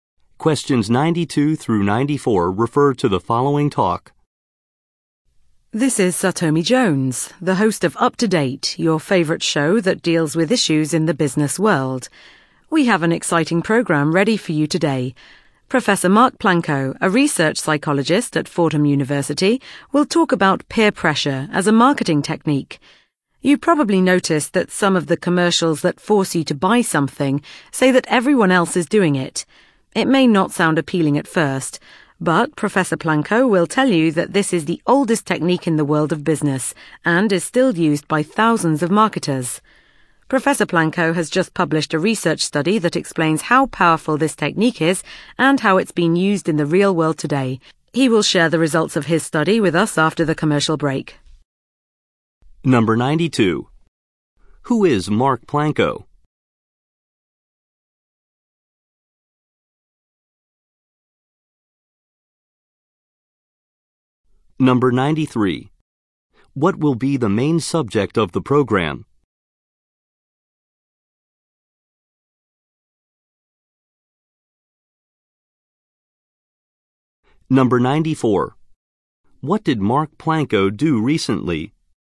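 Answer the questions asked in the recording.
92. A research psychologist
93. Peer pressure as a marketing technique
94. Published a research study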